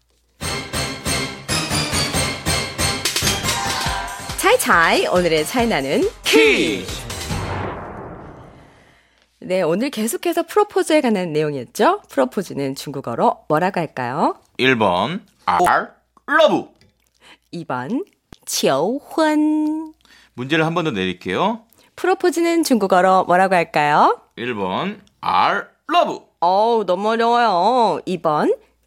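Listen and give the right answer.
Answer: 2: 求婚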